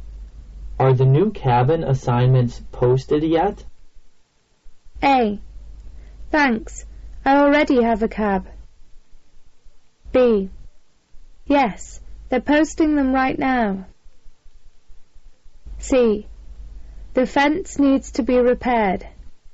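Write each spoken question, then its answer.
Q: Are the new cabin assignments posted yet?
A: B: Yes, they're posting them right now.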